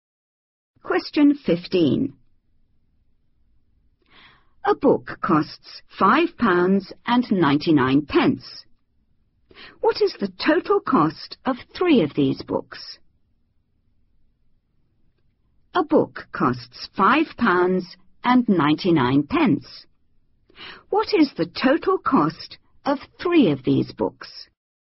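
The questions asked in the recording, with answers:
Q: £5.99. What is the total cost of three of these books?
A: £17.97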